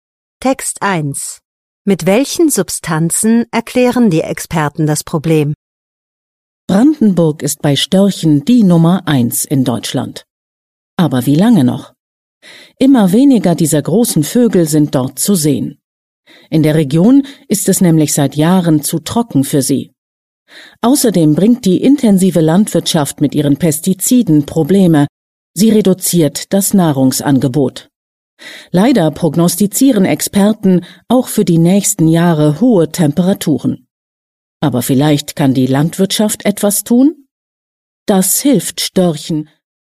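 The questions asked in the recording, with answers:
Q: Mit welchen Substanzen erklären die Experten das Problem?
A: Mit Pestiziden aus der intensiven Landwirtschaft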